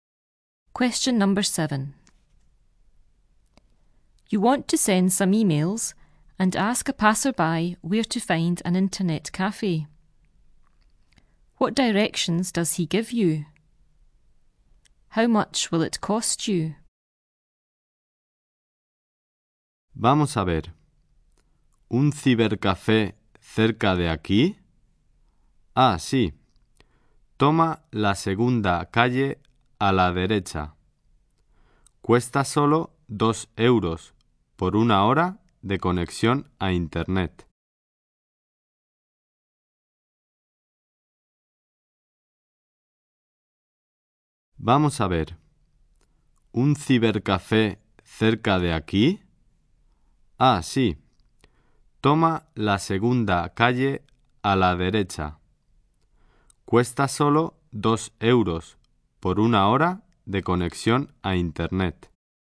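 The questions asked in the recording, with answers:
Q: What directions does he give you?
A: Take the second street on the right

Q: How much will it cost you?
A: 2 euros for one hour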